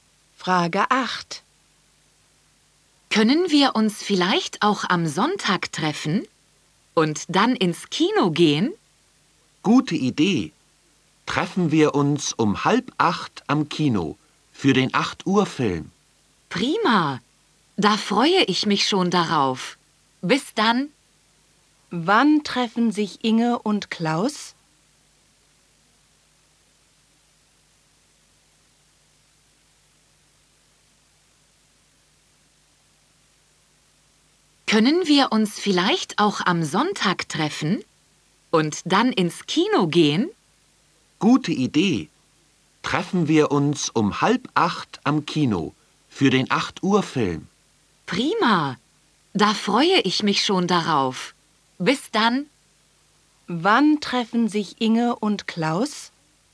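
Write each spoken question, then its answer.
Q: Wann treffen sich Inge und Klaus?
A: Am Sonntag um 7:30 am Kino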